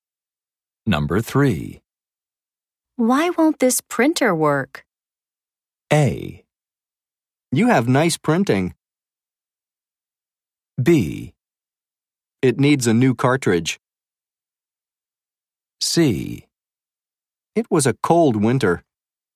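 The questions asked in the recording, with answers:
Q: Why won't this printer work?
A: B: It needs a new cartridge.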